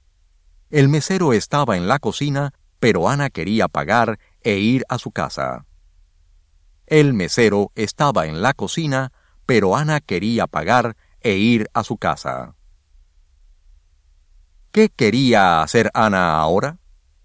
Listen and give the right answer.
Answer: Ella quería pagar e ir a su casa.